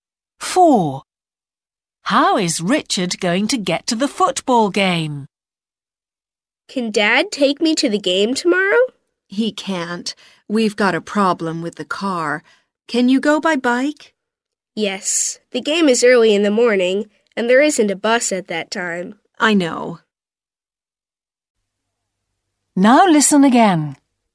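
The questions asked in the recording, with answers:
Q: How is Richard going to get to the football game?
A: by bike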